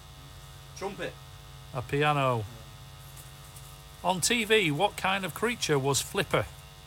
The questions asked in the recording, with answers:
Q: On TV, what kind of creature was Flipper?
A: A dolphin.